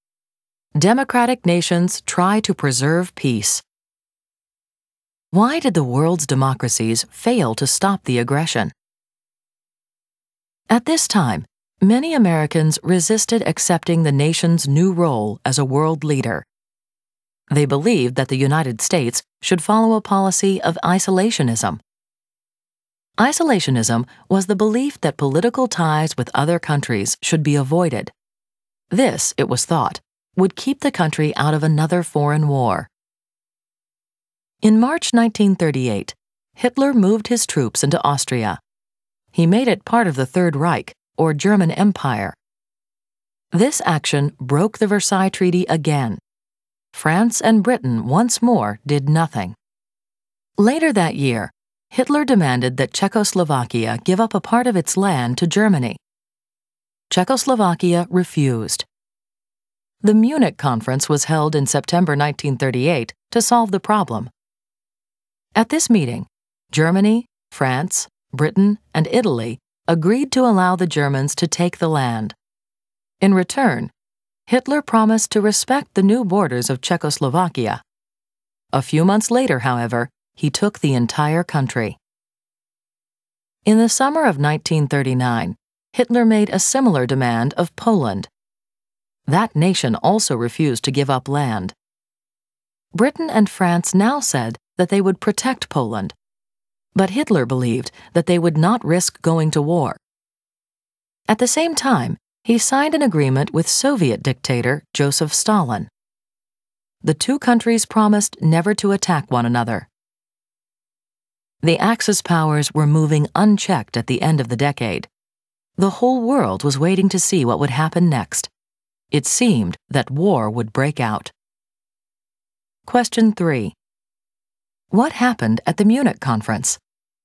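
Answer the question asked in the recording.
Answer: Germany, France, Britain and Italy agreed to let Germany take part of Czechoslovakia, and Hitler promised to respect its new borders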